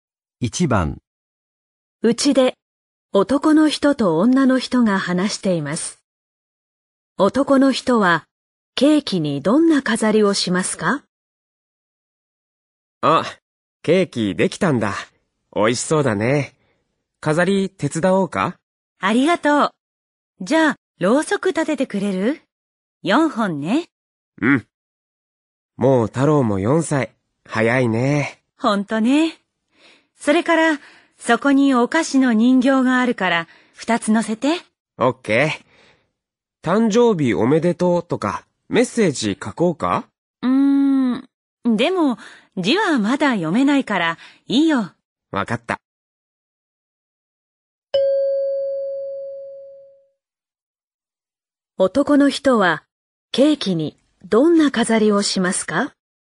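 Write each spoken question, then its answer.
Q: 男の人は、ケーキにどんな飾りをしますか?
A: ろうそくを4本立てて、お菓子の人形を2つ乗せる(メッセージは書かない)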